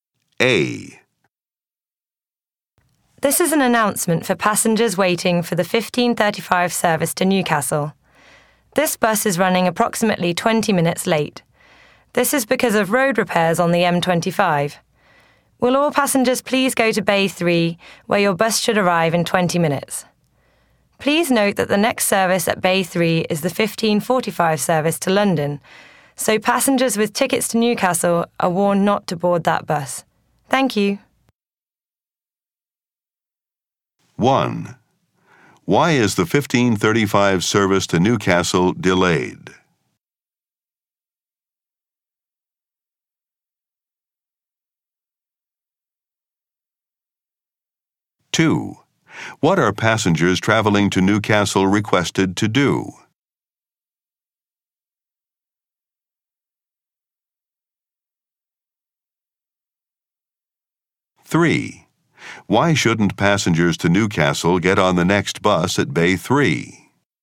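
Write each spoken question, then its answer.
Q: Why is the 15:35 service to Newcastle delayed?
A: Because of road repairs on the M25

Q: What are passengers traveling to Newcastle requested to do?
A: Go to Bay 3

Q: Why shouldn't passengers to Newcastle get on the next bus at Bay 3?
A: It is the 15:45 service to London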